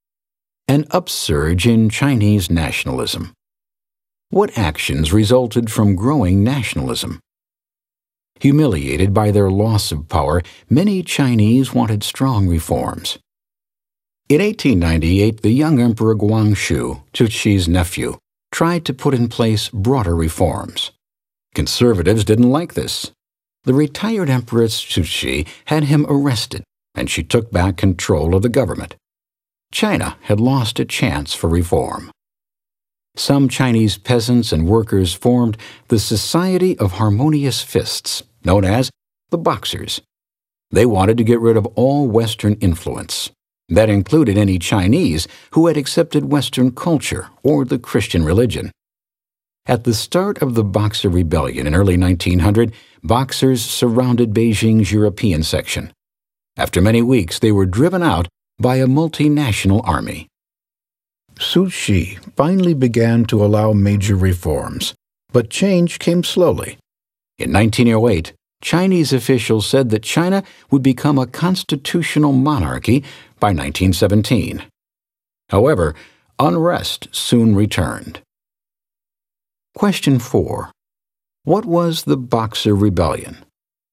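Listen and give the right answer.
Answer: A 1900 uprising by the Boxers, a peasant and worker society that wanted to get rid of Western influence. They surrounded Beijing's European section and were driven out by a multinational army.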